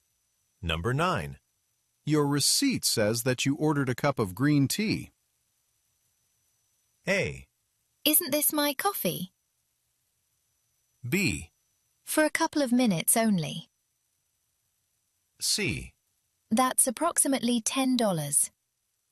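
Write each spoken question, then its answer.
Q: Your receipt says that you ordered a cup of green tea.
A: A: Isn't this my coffee?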